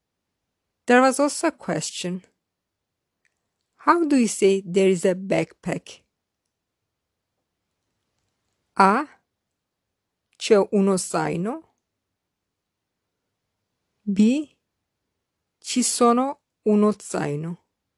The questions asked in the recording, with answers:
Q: How do you say there is a backpack?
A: The correct answer is A. C'è uno zaino.